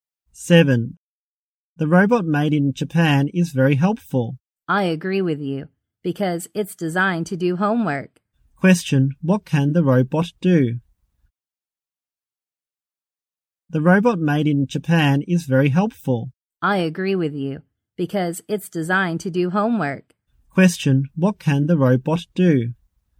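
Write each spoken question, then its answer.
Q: Question, what can the robot do?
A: Do homework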